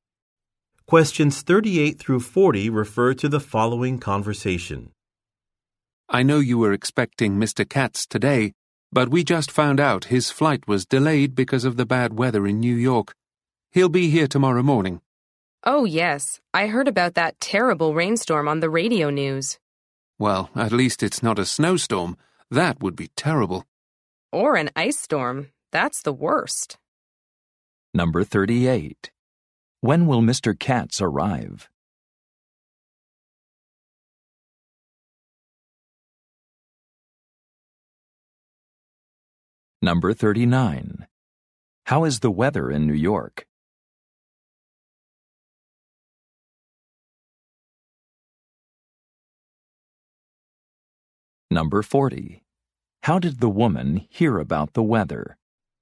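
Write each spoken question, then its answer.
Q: When will Mr. Katz arrive?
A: Tomorrow morning

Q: How is the weather in New York?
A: Rainy, a rainstorm

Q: How did the woman hear about the weather?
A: On the radio news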